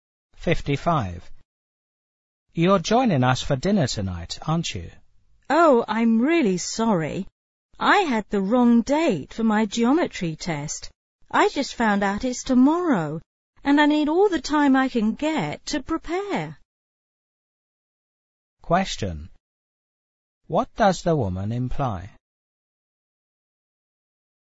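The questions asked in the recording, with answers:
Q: What does the woman imply?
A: She can't join them for dinner because she must study for her test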